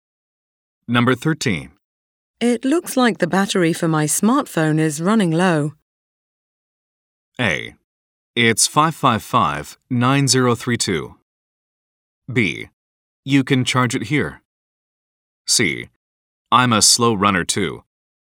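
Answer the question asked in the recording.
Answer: B: You can charge it here.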